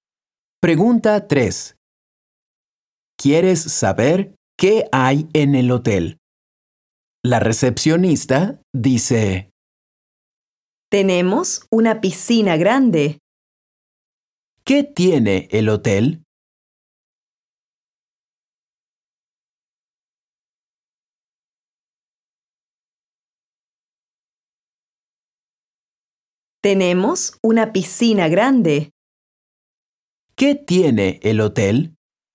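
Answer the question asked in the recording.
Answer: una piscina grande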